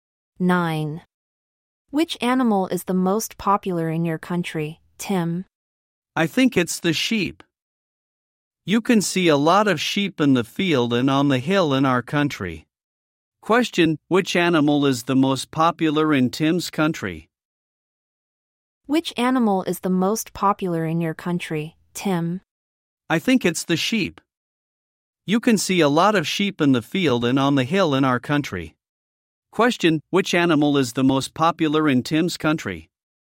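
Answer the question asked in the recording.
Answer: The sheep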